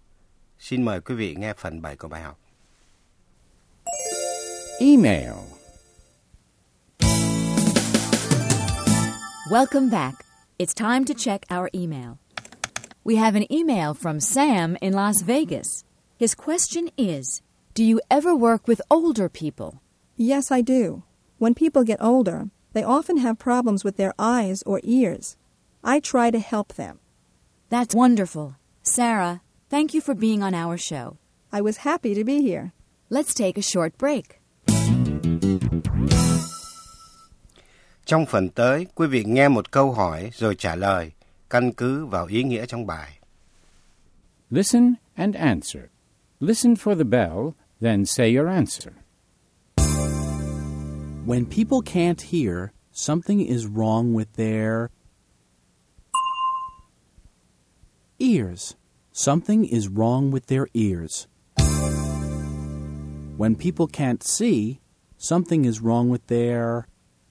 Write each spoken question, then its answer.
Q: When people can't see, something is wrong with their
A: eyes. Something is wrong with their eyes.